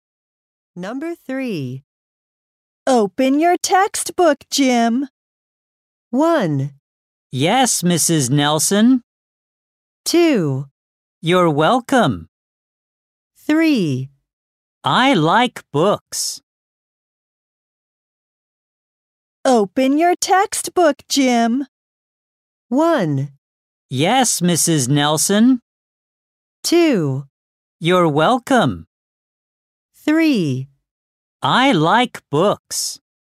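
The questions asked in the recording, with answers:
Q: Open your textbook, Jim.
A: 1: Yes, Mrs. Nelson.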